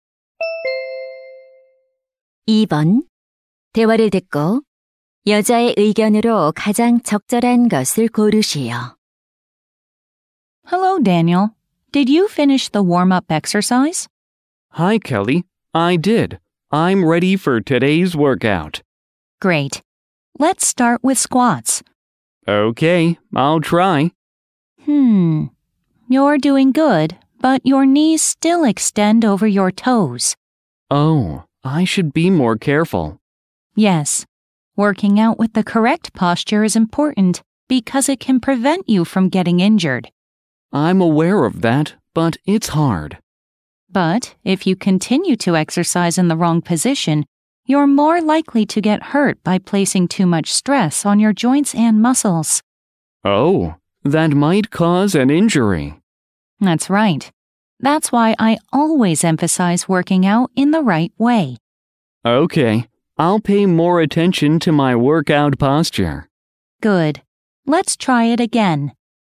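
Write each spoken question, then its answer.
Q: 대화를 듣고 여자의 의견으로 가장 적절한 것을 고르시오.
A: 올바른 자세로 운동해야 부상을 예방할 수 있다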